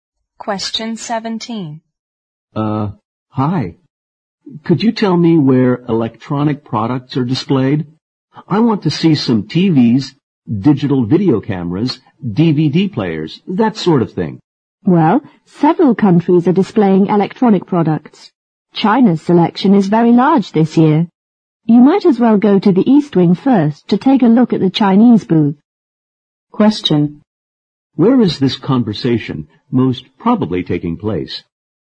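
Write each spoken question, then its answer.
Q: Where is this conversation most probably taking place?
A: At an exhibition or trade fair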